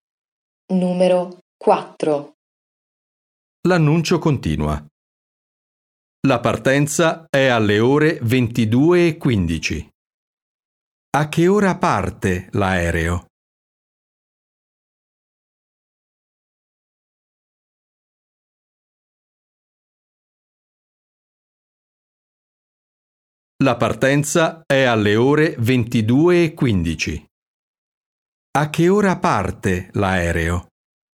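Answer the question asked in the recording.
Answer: Alle 22:15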